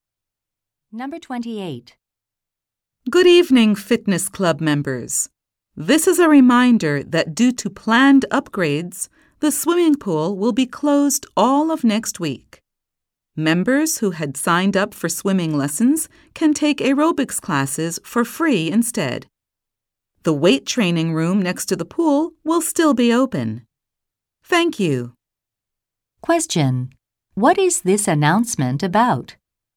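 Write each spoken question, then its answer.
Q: What is this announcement about?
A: The pool closing next week for upgrades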